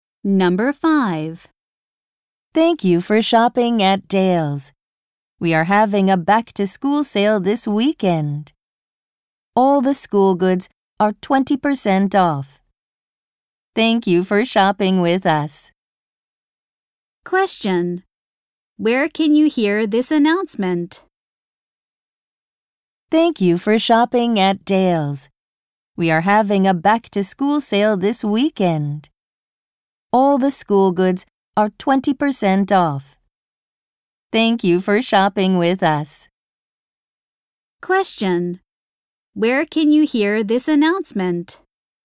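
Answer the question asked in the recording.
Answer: At a store (Dale's)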